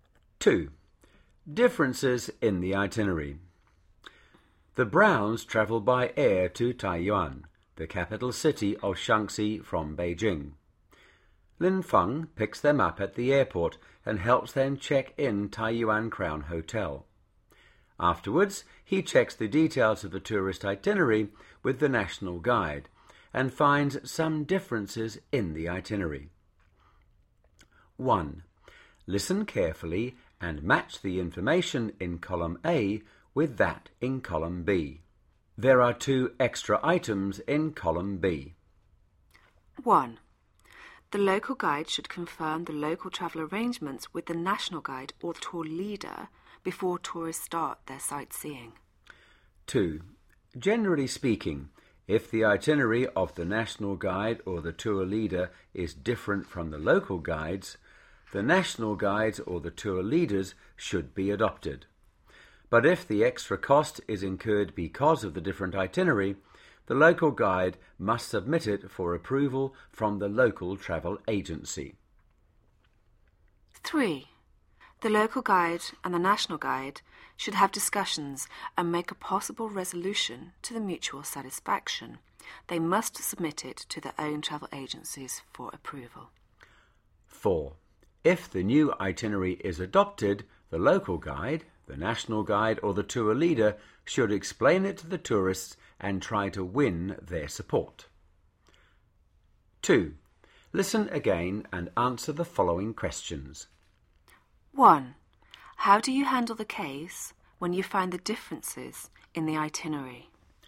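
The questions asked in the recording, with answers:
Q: How do you handle the case when you find the differences in the itinerary?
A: Confirm with the national guide or tour leader, usually adopt their itinerary, discuss a resolution, get approval from the travel agencies, and explain it to the tourists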